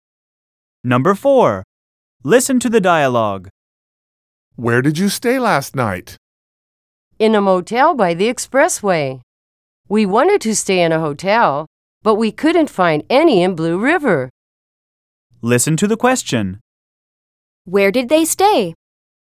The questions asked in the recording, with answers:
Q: Where did they stay?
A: The woman said they couldn't find any hotel in Blue River, so they stayed in a motel.